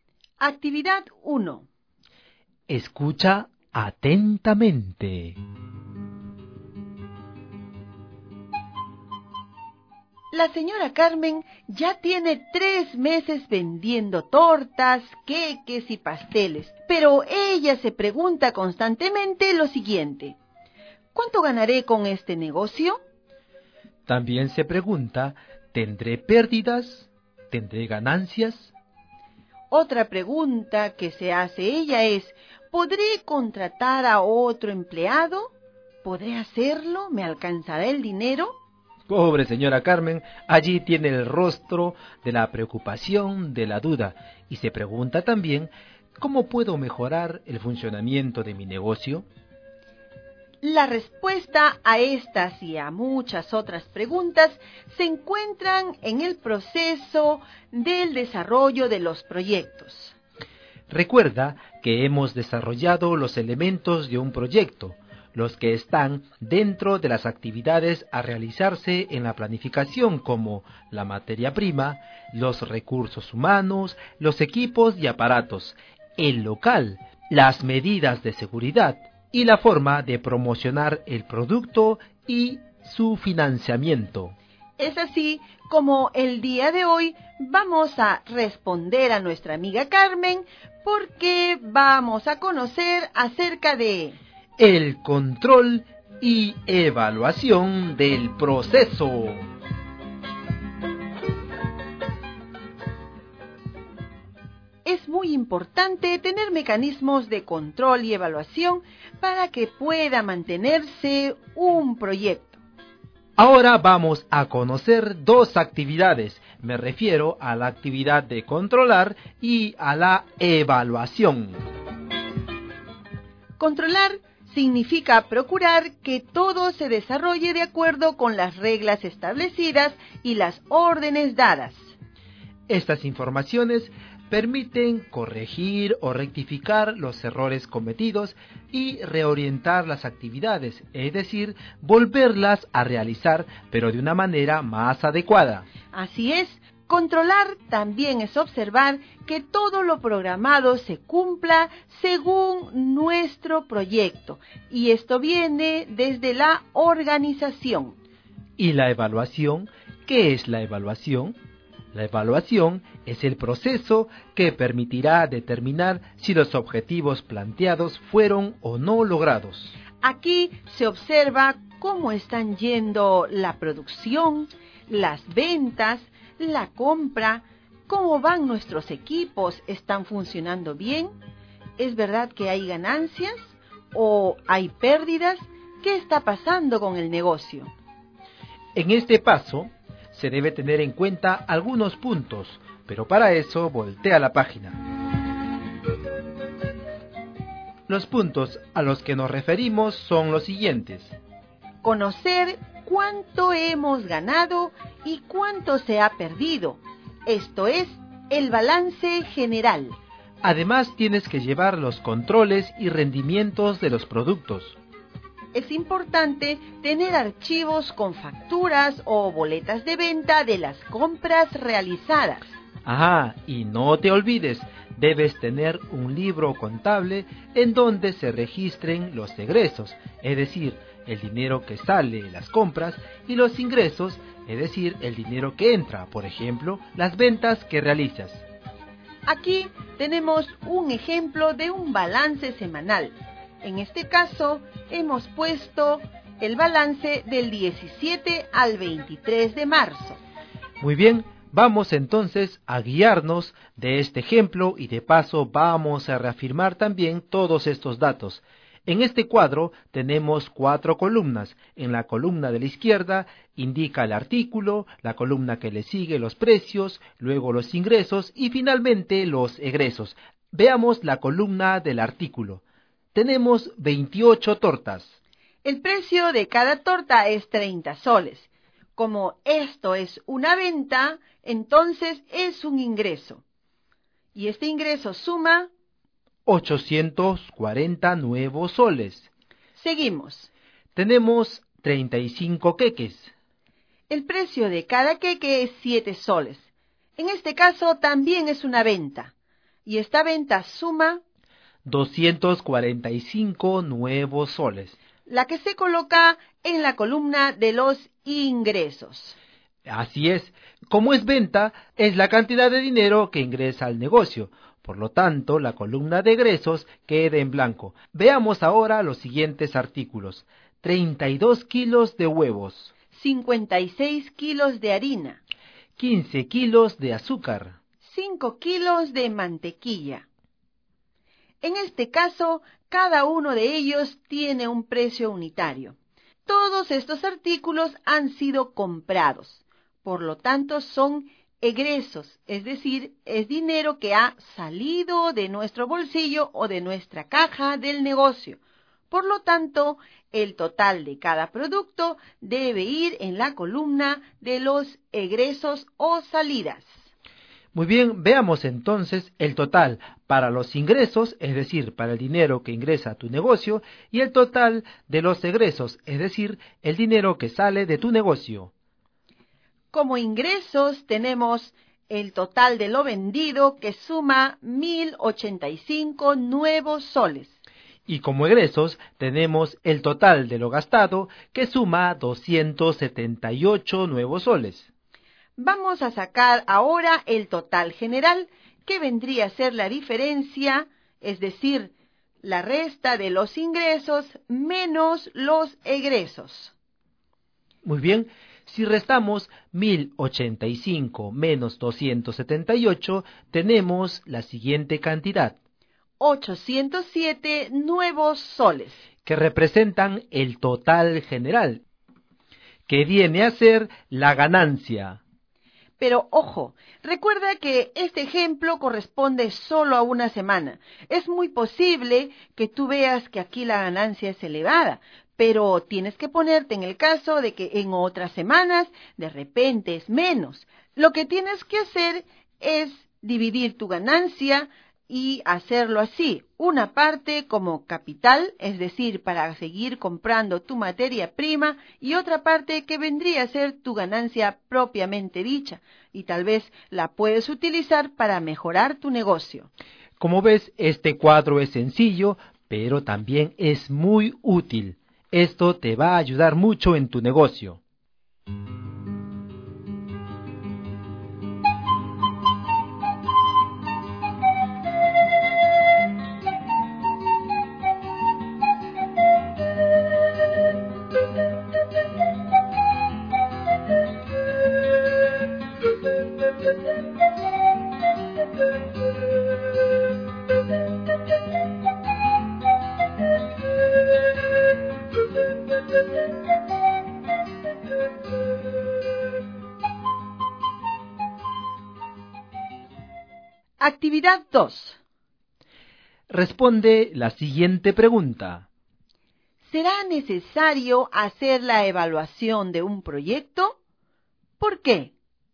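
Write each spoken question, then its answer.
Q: ¿Será necesario hacer la evaluación de un proyecto?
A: Sí, porque permite saber si se lograron los objetivos y si hay ganancias o pérdidas, para corregir errores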